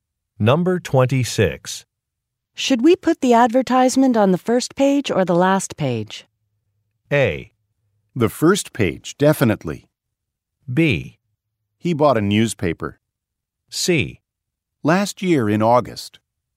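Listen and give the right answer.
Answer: A: The first page, definitely.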